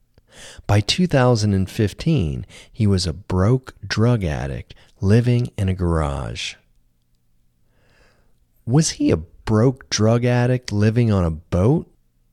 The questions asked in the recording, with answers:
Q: Was he a broke drug addict living on a boat?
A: No, he wasn't a broke drug addict living on a boat. He was a broke drug addict living in a garage.